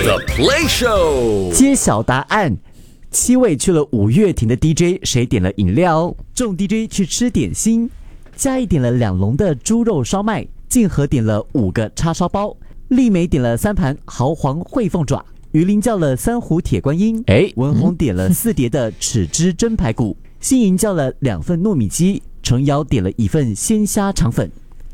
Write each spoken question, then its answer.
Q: 七位去了五月亭的 DJ, 谁点了饮料?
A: 鱼鳞, 他叫了铁观音。